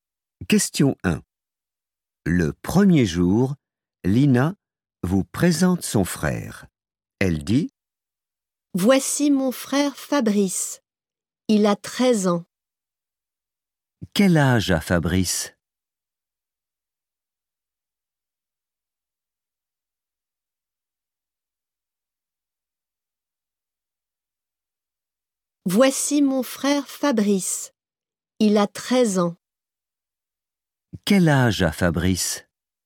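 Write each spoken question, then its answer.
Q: Quel âge a Fabrice?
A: 13 ans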